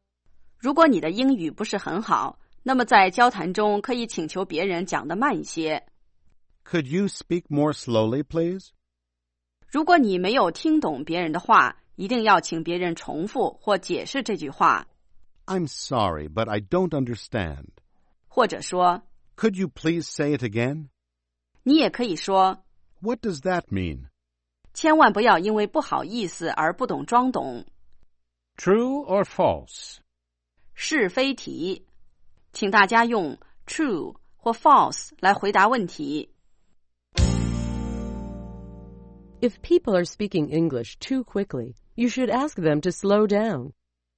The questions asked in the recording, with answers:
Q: If people are speaking English too quickly, you should ask them to slow down.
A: True, you can say, "Could you speak more slowly, please?"